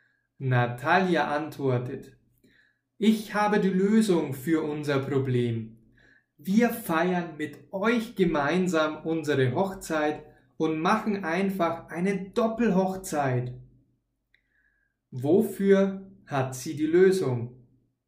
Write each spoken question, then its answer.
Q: Wofür hat sie die Lösung?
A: Für ihr Problem. Sie hat die Lösung für ihr Problem.